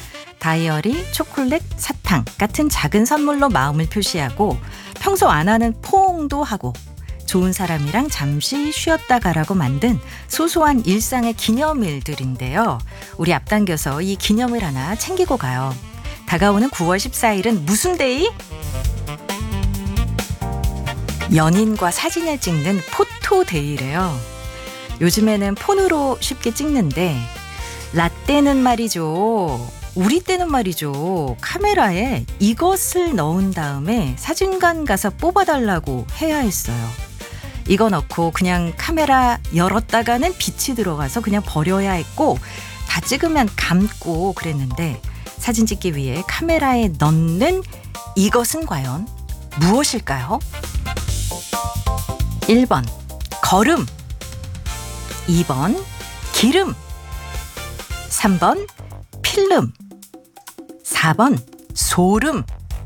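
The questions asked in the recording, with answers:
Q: 사진 찍기 위해 카메라에 넣는 이것은 과연 무엇일까요?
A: 3: 필름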